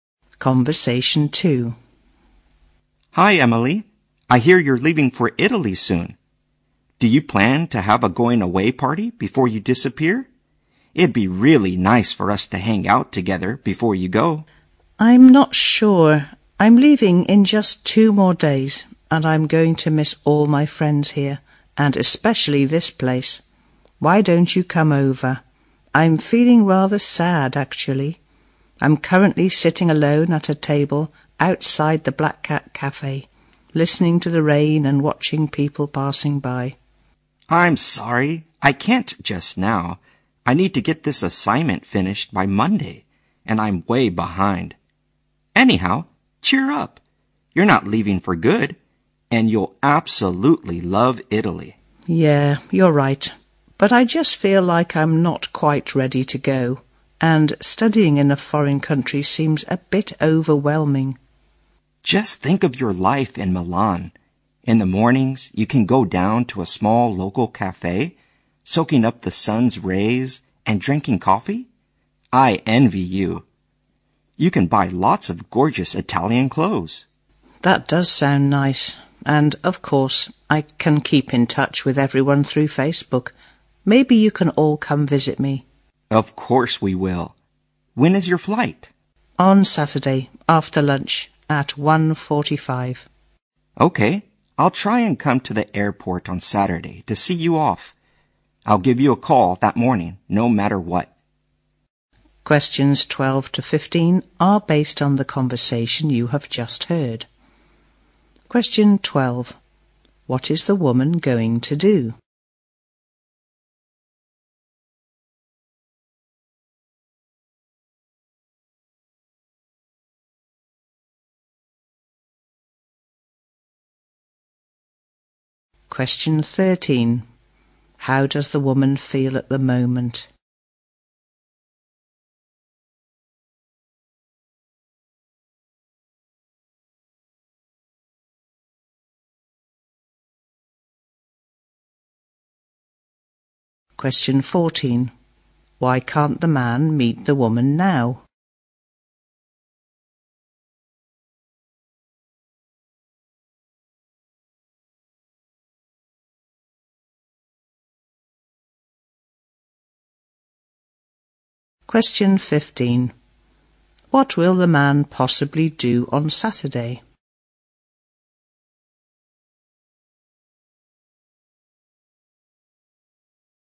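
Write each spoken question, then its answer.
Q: What is the woman going to do?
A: Go to study in Italy

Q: How does the woman feel at the moment?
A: Rather sad

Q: Why can't the man meet the woman now?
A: He must finish an assignment by Monday

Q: What will the man possibly do on Saturday?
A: See her off at the airport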